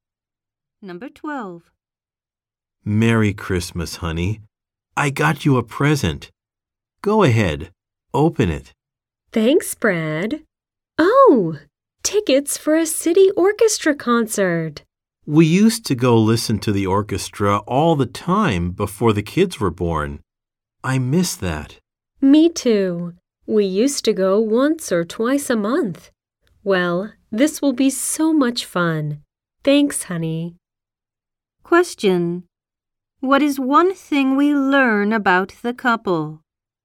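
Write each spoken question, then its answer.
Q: What is one thing we learn about the couple?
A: They used to go to orchestra concerts often before their kids were born.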